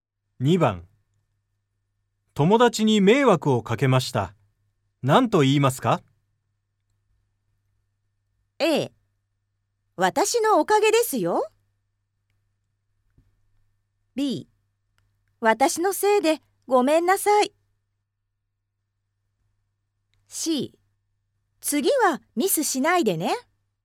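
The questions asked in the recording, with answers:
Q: 友達に迷惑をかけました。何と言いますか?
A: B: 私のせいでごめんなさい。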